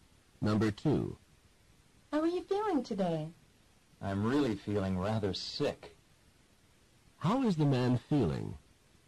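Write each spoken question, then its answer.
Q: How is the man feeling?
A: Sick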